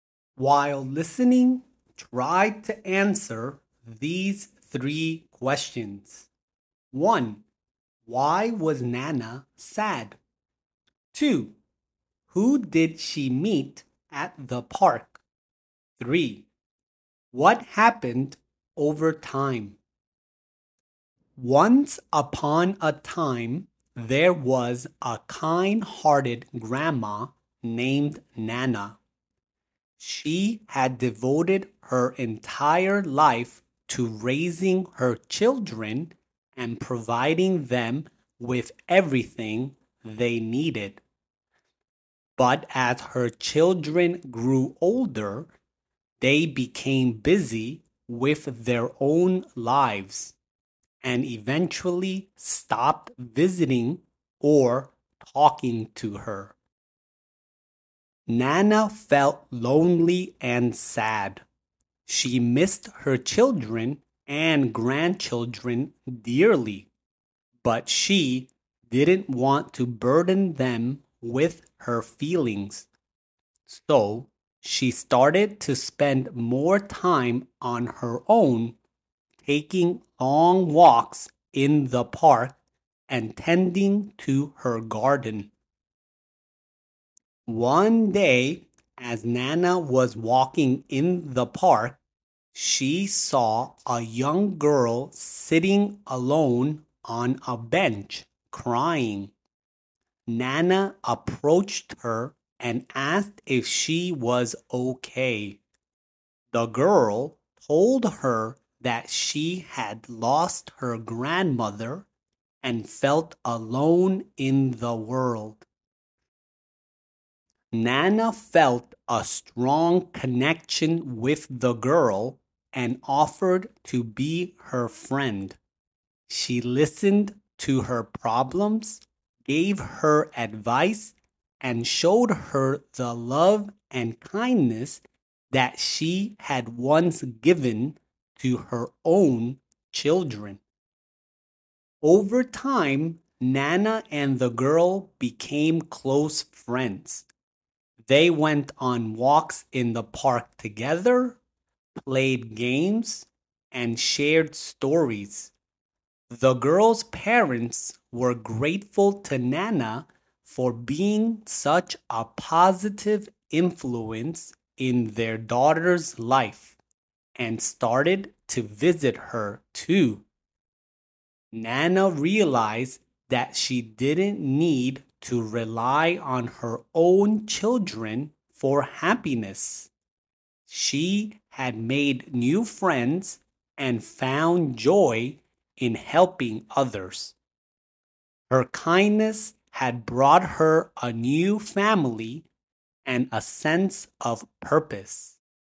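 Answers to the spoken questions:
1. Her children stopped visiting or talking to her, so she was lonely.
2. A young girl crying alone on a bench
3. Nana and the girl became close friends, and the girl's parents started visiting her too.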